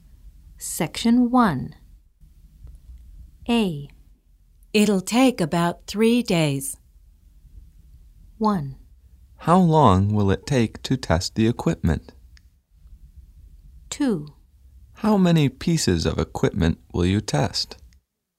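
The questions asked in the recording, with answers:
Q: Find the correct question or statement.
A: 1: How long will it take to test the equipment?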